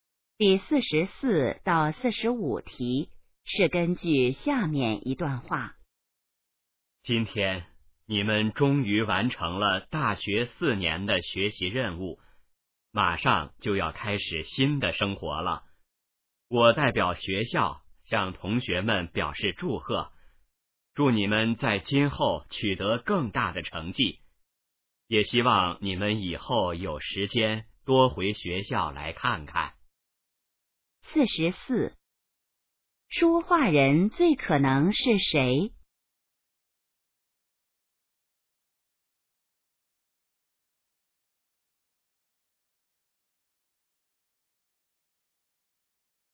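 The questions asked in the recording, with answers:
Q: 这段话最可能是在什么时候说的?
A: 大学毕业时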